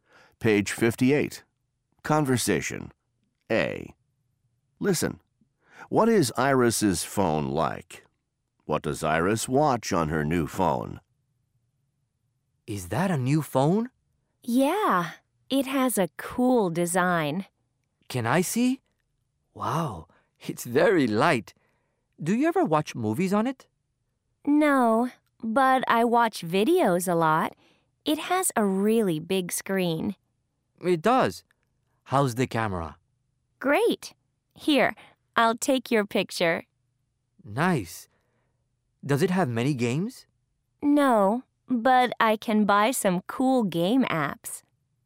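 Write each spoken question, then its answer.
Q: What is Iris's phone like?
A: It has a cool design, it's very light, has a really big screen and a great camera.

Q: What does Iris watch on her new phone?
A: Videos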